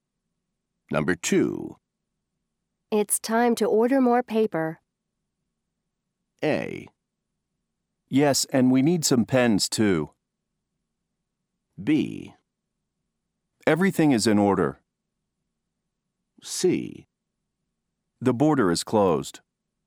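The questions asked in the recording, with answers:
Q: It's time to order more paper.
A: A: Yes, and we need some pens, too.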